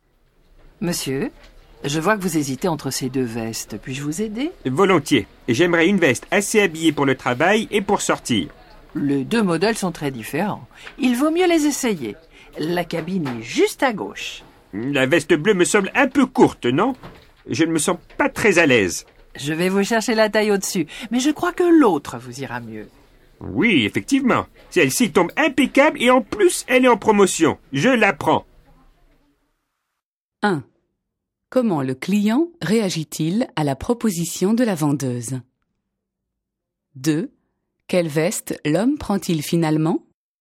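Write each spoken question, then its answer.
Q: Comment le client réagit-il à la proposition de la vendeuse?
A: Il accepte volontiers son aide

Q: Quelle veste l'homme prend-il finalement?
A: L'autre veste (pas la bleue), celle qui est en promotion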